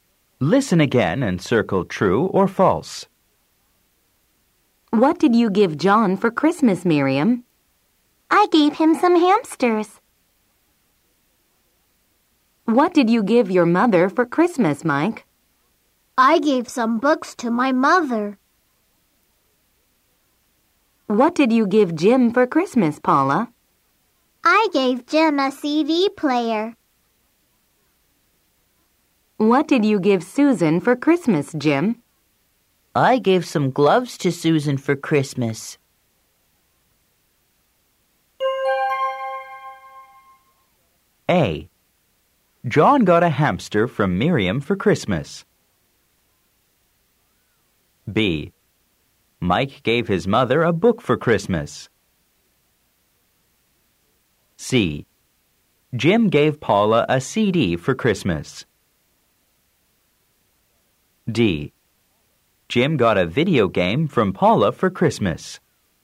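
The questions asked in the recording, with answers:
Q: Jim gave Paula a CD for Christmas.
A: False

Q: Jim got a video game from Paula for Christmas.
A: False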